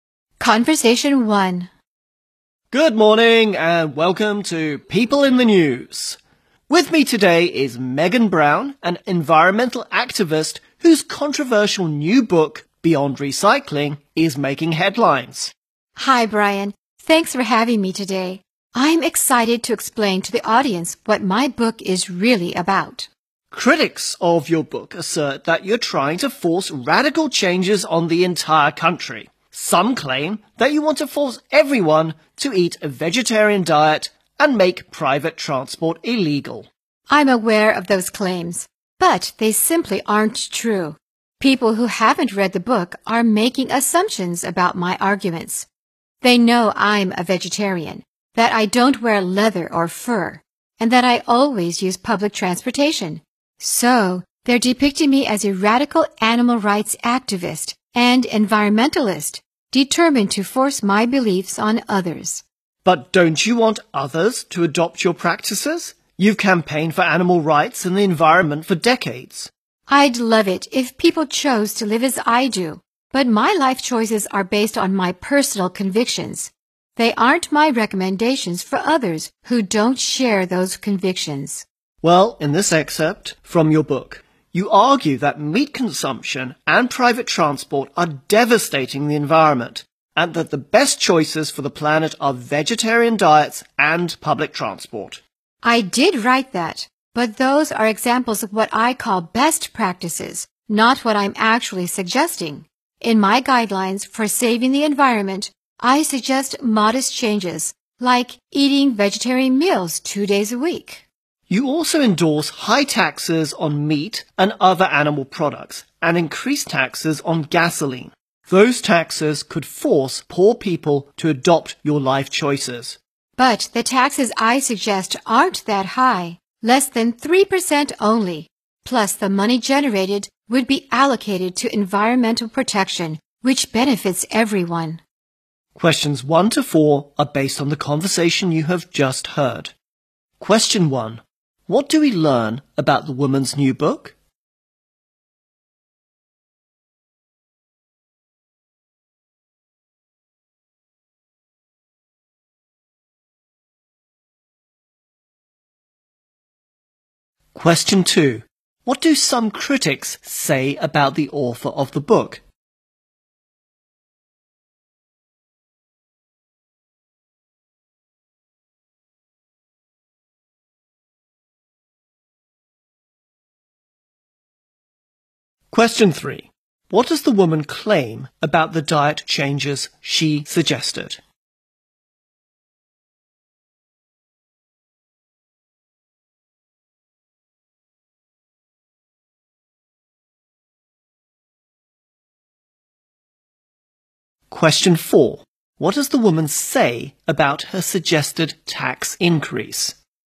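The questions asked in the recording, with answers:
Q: What do some critics say about the author of the book?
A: She wants to force radical changes (vegetarian diet, no private transport) on the whole country

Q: What does the woman claim about the diet changes she suggested?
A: They are modest, like eating vegetarian meals two days a week

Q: What does the woman say about her suggested tax increase?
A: It isn't that high (less than 3%) and the money would go to environmental protection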